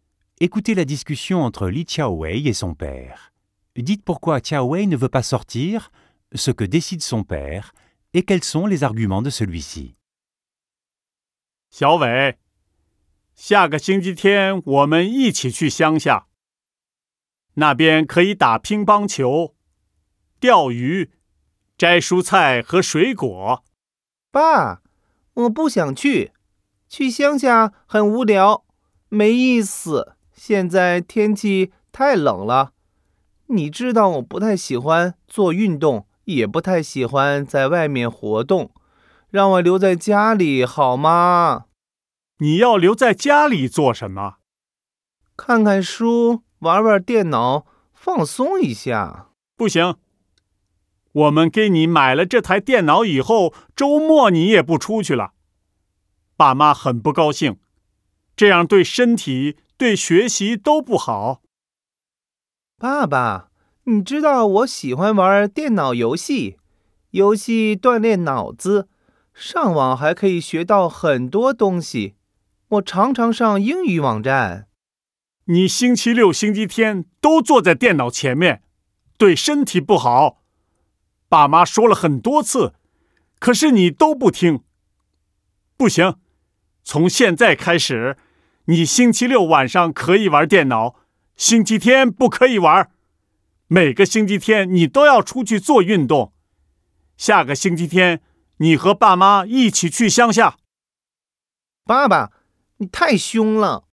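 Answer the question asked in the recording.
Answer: Chaowei trouve la campagne ennuyeuse, il fait trop froid et il n'aime pas le sport ni les activités dehors ; il veut rester à la maison pour lire et jouer à l'ordinateur. Le père décide qu'il pourra utiliser l'ordinateur le samedi soir mais pas le dimanche, qu'il devra sortir faire du sport chaque dimanche et qu'il ira à la campagne avec ses parents dimanche prochain. Ses arguments : rester le week-end devant l'ordinateur est mauvais pour la santé et pour les études, et Chaowei n'écoute pas ses parents.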